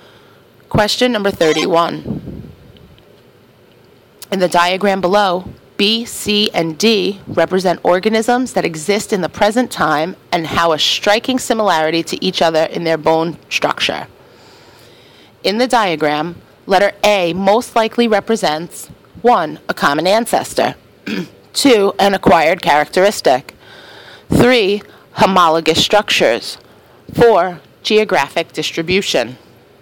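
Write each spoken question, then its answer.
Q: In the diagram, letter A most likely represents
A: 1: A common ancestor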